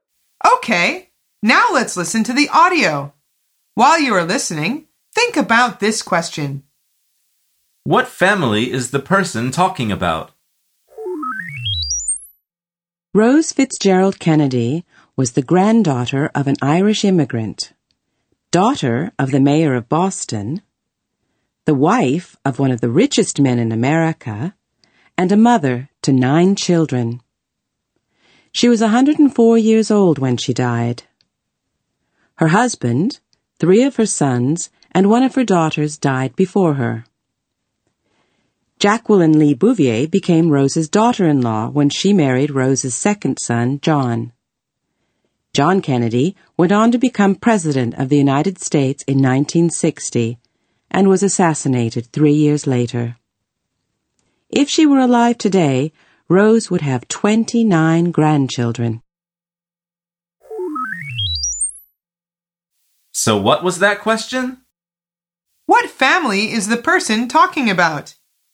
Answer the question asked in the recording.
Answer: The answer is the Kennedy family.